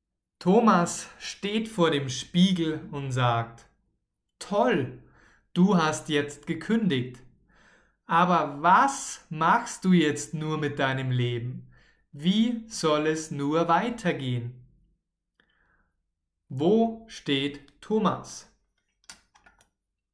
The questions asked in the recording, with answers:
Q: Wo steht Thomas?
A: Vor dem Spiegel. Er steht vor dem Spiegel.